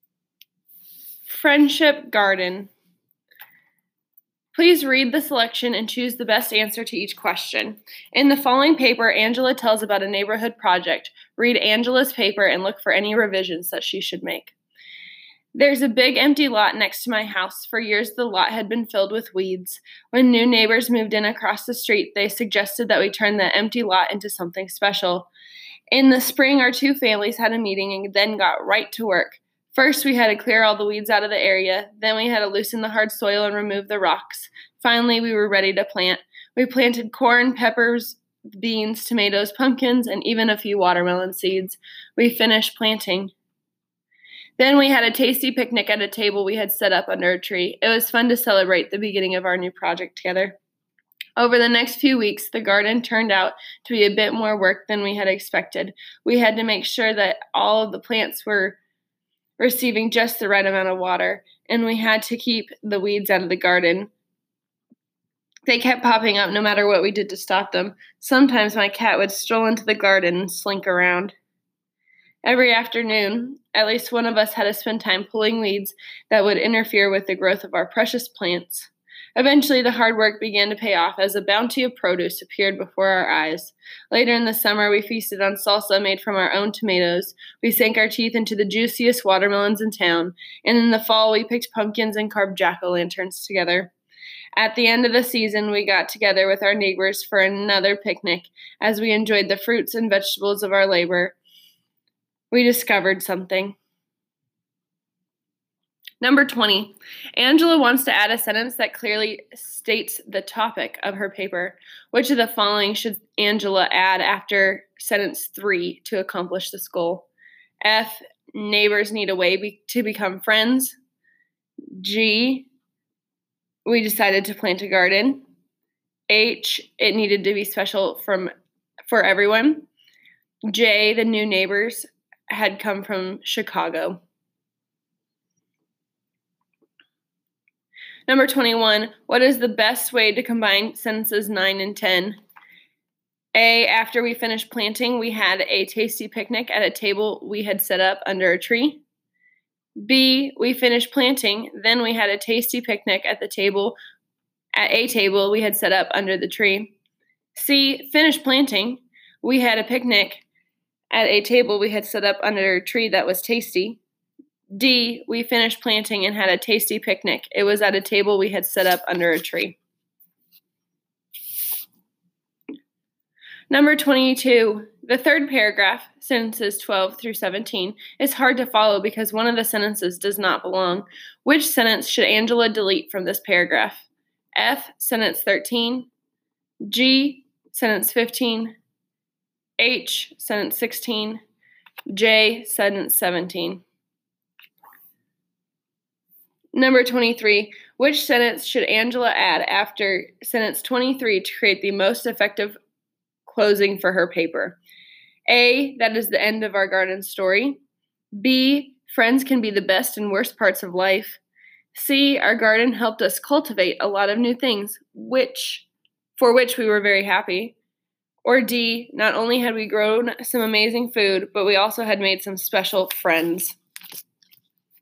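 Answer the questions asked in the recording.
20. G: We decided to plant a garden.
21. A: after we finished planting, we had a tasty picnic at a table we had set up under a tree.
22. G: sentence 15
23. D: not only had we grown some amazing food, but we also had made some special friends.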